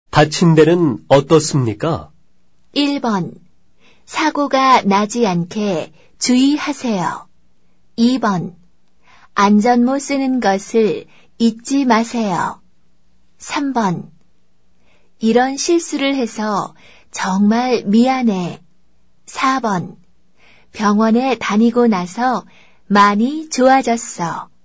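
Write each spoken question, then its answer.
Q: 다친 데는 어떻습니까?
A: 4: 병원에 다니고 나서 많이 좋아졌어.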